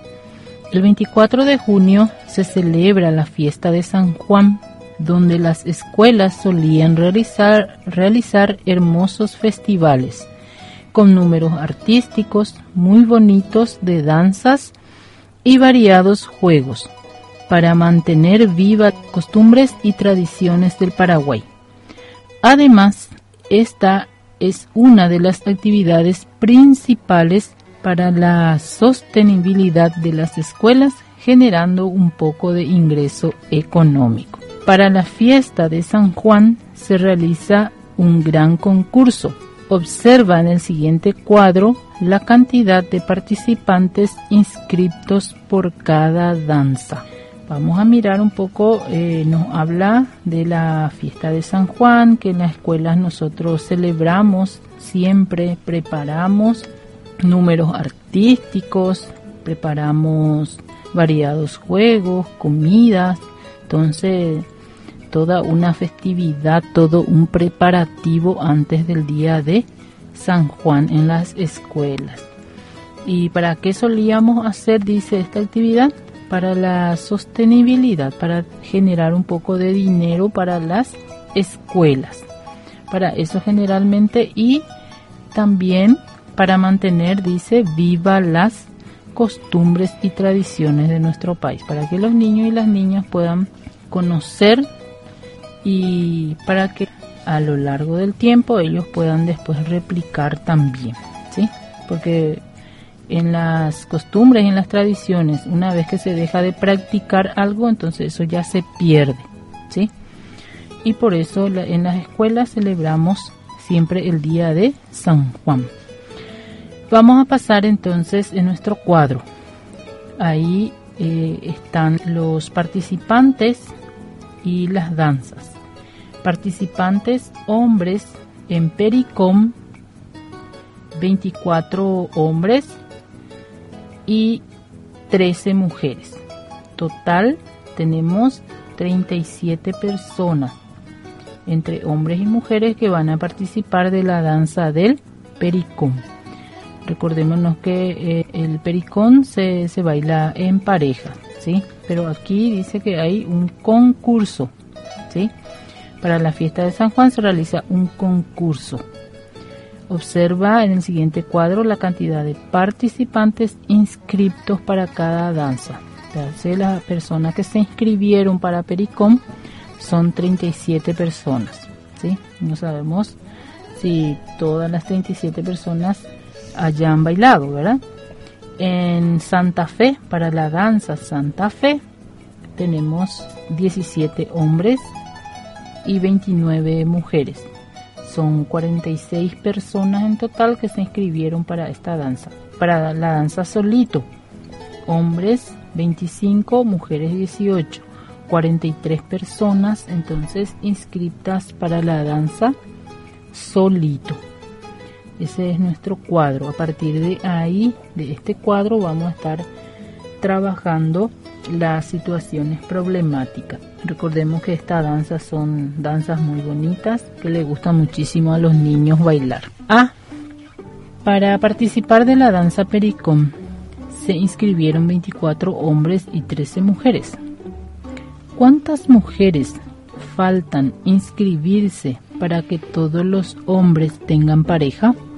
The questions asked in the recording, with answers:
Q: ¿Cuántas mujeres faltan inscribirse para que todos los hombres tengan pareja?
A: faltan inscribirse 11 mujeres para que todos los hombres tengan parejas.